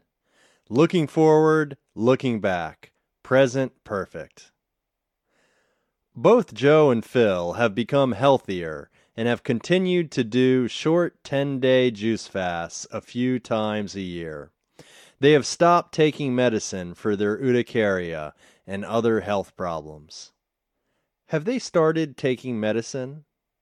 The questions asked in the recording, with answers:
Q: Have they started taking medicine?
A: No, they haven't started taking medicine.